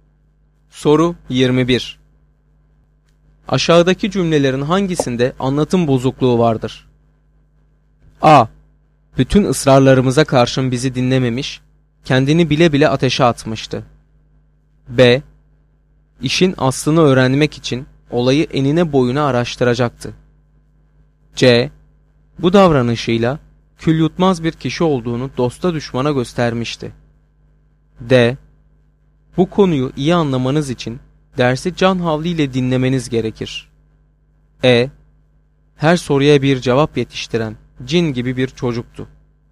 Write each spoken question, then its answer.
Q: Aşağıdaki cümlelerin hangisinde anlatım bozukluğu vardır?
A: Doğru cevap D şıkkı.